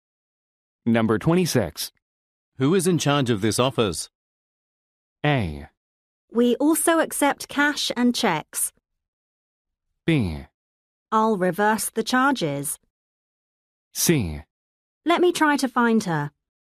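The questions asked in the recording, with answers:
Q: Who is in charge of this office?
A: C: Let me try to find her.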